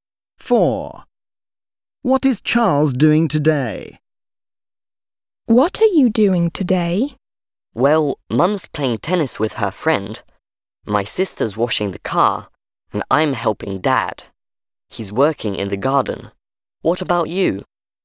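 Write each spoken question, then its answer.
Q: What is Charles doing today?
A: helping Dad in the garden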